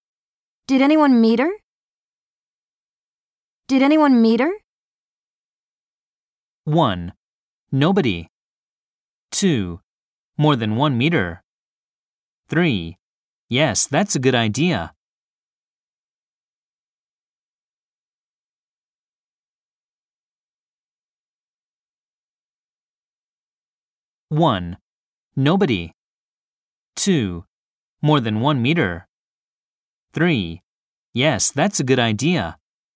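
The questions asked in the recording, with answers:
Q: Did anyone meet her?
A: 1: Nobody.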